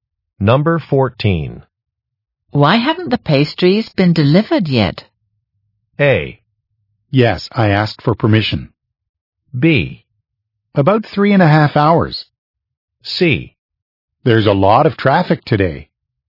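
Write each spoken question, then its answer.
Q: Why haven't the pastries been delivered yet?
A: C: There's a lot of traffic today.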